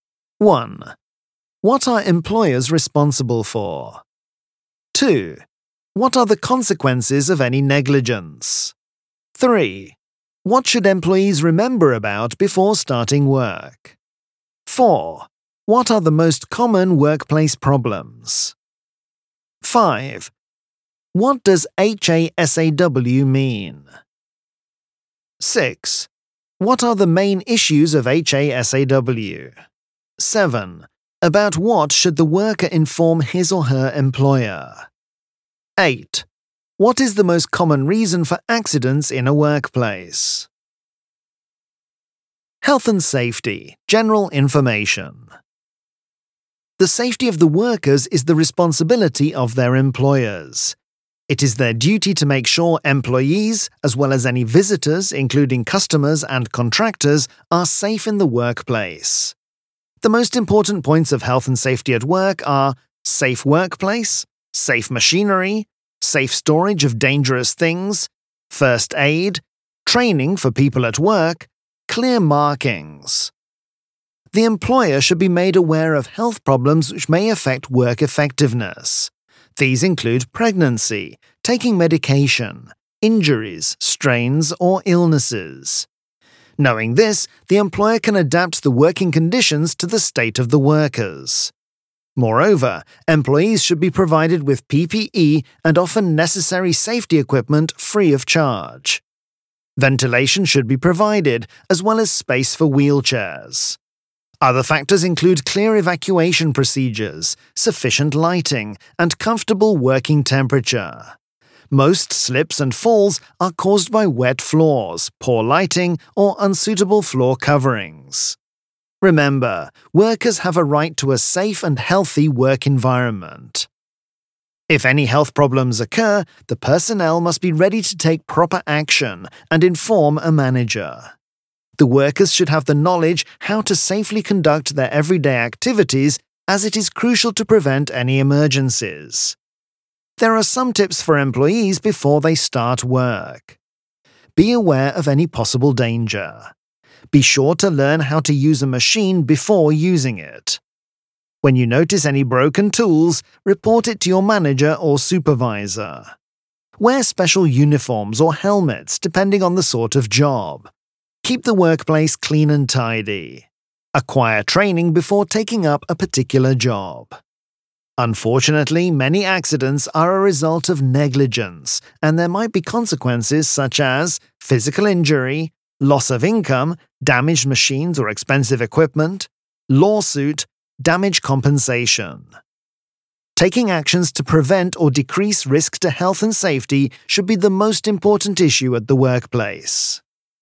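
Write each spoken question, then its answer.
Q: What are employers responsible for?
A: The safety of workers and visitors (customers, contractors) in the workplace

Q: What are the consequences of any negligence?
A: Physical injury, loss of income, damaged machines or equipment, lawsuit, damage compensation

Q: What should employees remember about before starting work?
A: Be aware of danger, learn to use machines, report broken tools, wear special uniforms or helmets, keep the workplace clean, get training

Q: About what should the worker inform his or her employer?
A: Health problems such as pregnancy, medication, injuries, strains or illnesses

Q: What is the most common reason for accidents in a workplace?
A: Negligence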